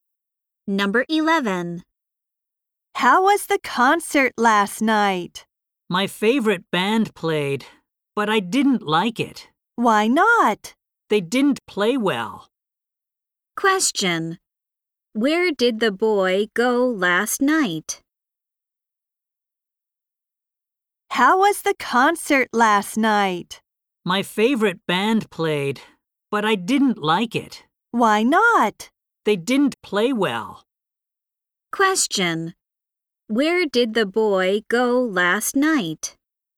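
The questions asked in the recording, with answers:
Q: Where did the boy go last night?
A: To a concert.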